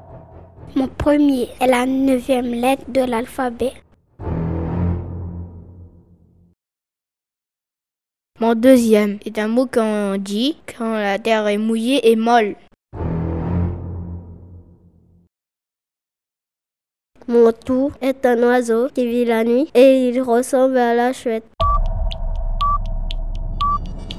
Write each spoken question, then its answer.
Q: Mon tout est un oiseau qui vit la nuit et il ressemble à la chouette.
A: le hibou.